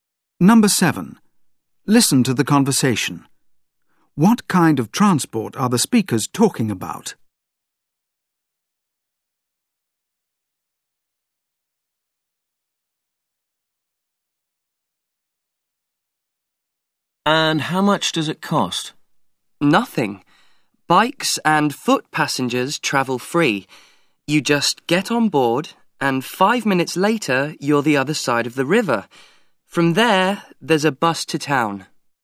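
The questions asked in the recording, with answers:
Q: What kind of transport are the speakers talking about?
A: A ferry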